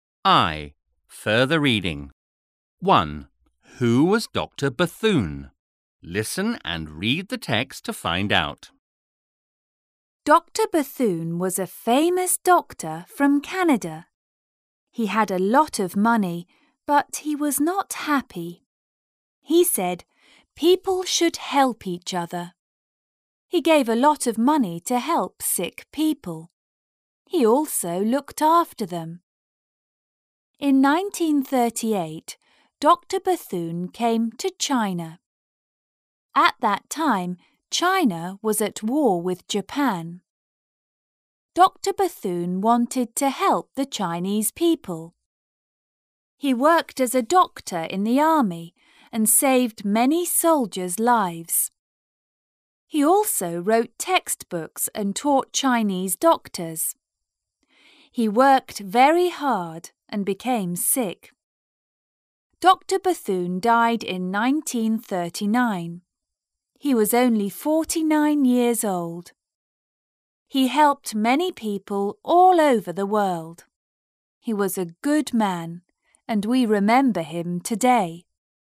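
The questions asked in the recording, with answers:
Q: Who was Dr. Bethune?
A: A famous doctor from Canada who helped people, including Chinese soldiers during the war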